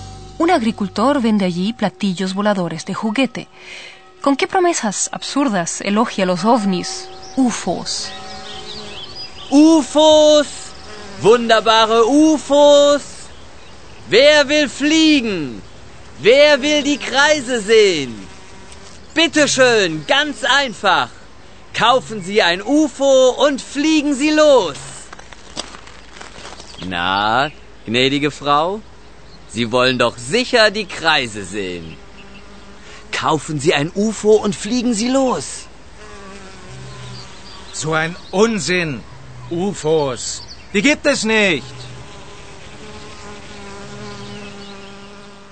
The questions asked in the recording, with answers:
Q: ¿Con qué promesas absurdas elogia los ovnis, UFOs?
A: La gente debe comprarlos, kaufen, y simplemente alzar el vuelo.